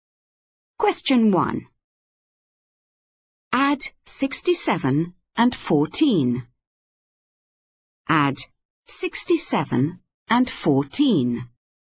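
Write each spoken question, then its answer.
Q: Add 67 and 14.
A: 81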